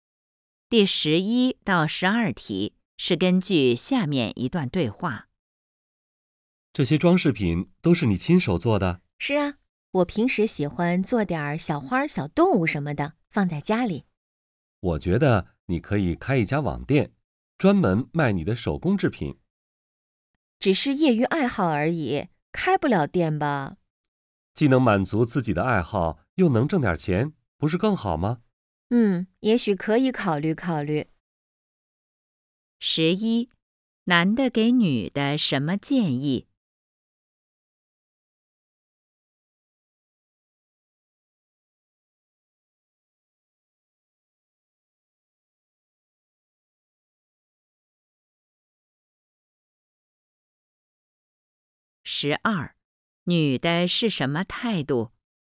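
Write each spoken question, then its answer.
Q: 男的给女的什么建议?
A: 开一家网店卖手工制品

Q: 女的是什么态度?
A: 可以考虑考虑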